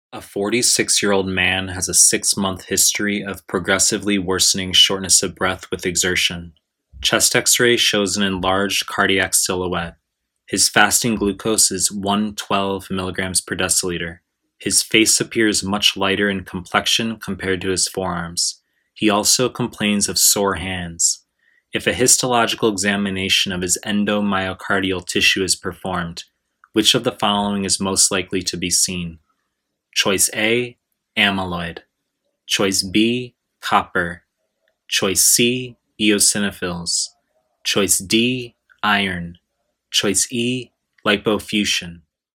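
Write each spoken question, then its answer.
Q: If a histological examination of his endomyocardial tissue is performed, which of the following is most likely to be seen?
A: D: iron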